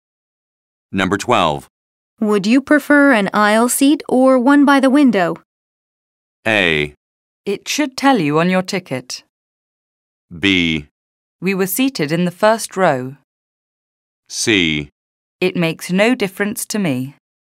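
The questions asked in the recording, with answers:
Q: Would you prefer an aisle seat or one by the window?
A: C: It makes no difference to me.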